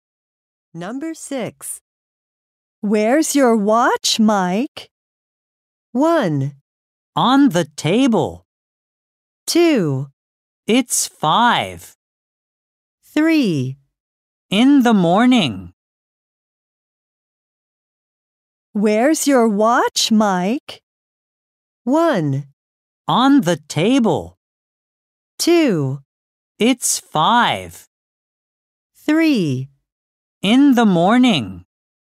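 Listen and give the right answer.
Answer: 1: On the table.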